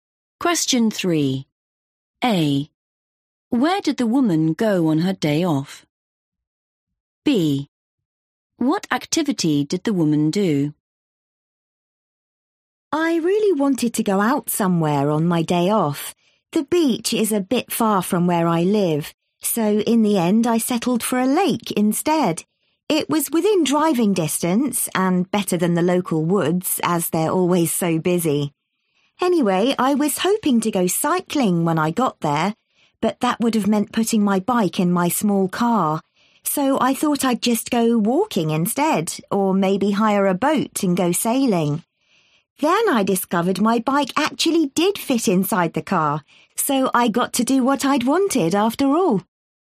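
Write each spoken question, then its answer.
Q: Where did the woman go on her day off?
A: a lake

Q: What activity did the woman do?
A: cycling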